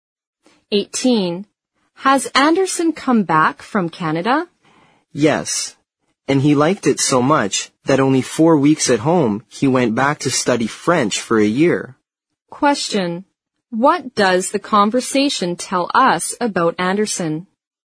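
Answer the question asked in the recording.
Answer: After four weeks at home he went back to Canada to study French for a year.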